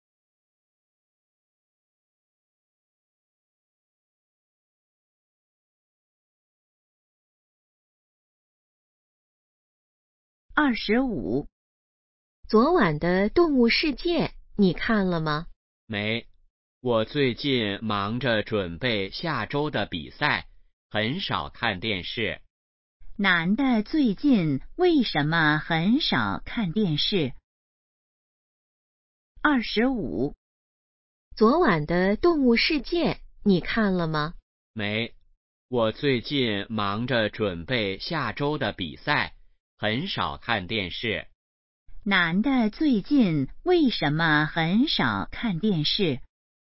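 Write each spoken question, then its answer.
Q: 男的最近为什么很少看电视?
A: 忙着准备比赛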